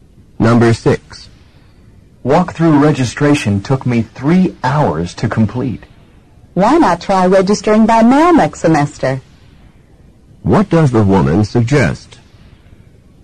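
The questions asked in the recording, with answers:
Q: What does the woman suggest?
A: Registering by mail next semester.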